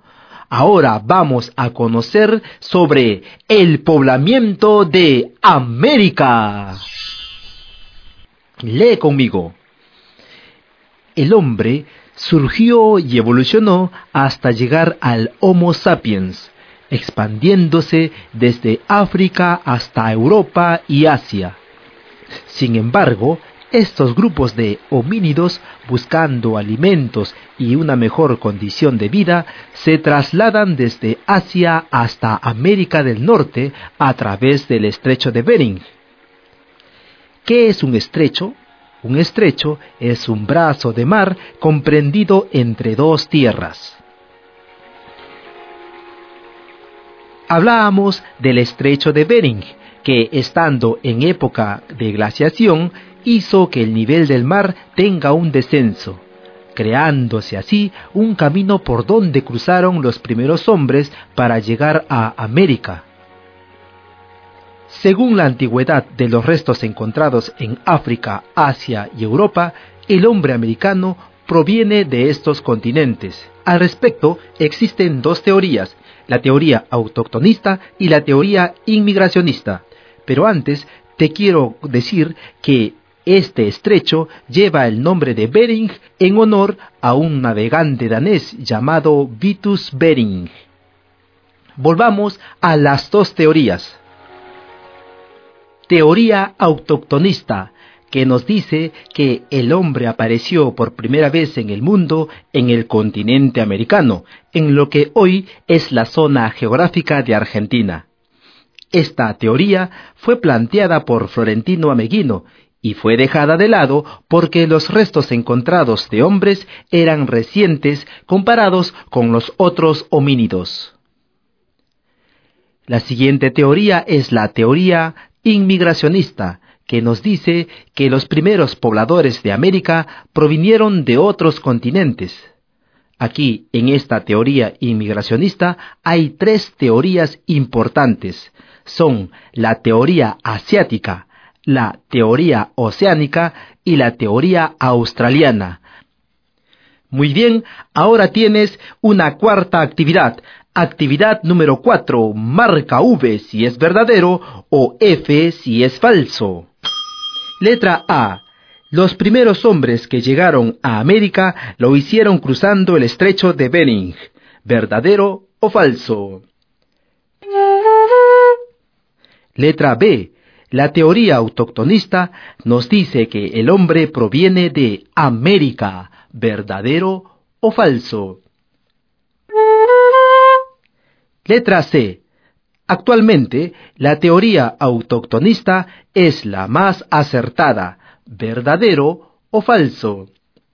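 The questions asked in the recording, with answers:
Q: Letra A. Los primeros hombres que llegaron a América lo hicieron cruzando el Estrecho de Bering.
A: V (verdadero)

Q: Letra B. La teoría autoctonista nos dice que el hombre proviene de América.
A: V (verdadero)

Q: Letra C. Actualmente, la teoría autoctonista es la más acertada.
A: F (falso)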